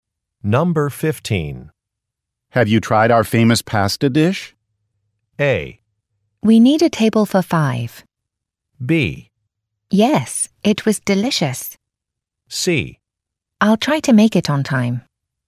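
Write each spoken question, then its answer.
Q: Have you tried our famous pasta dish?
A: B: Yes, it was delicious.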